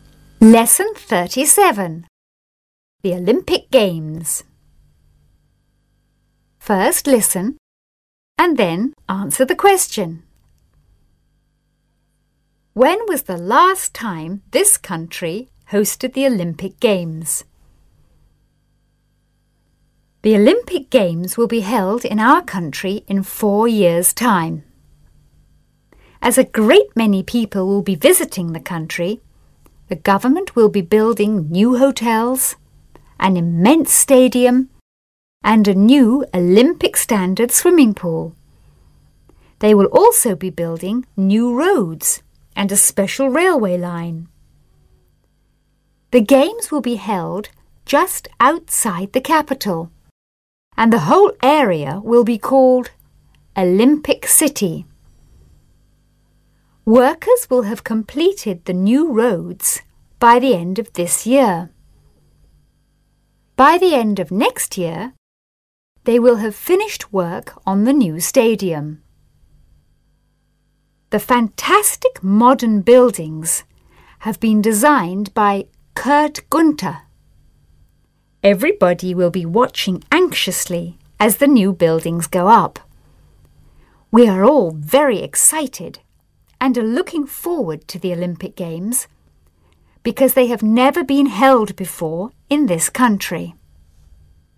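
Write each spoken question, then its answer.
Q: When was the last time this country hosted the Olympic Games?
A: Never; the Olympic Games have never been held there before.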